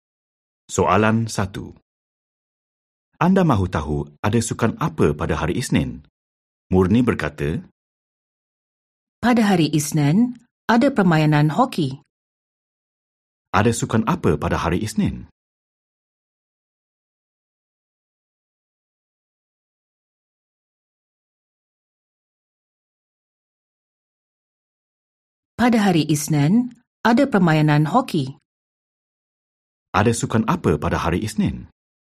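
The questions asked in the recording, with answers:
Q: Ada sukan apa pada hari Isnin?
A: hoki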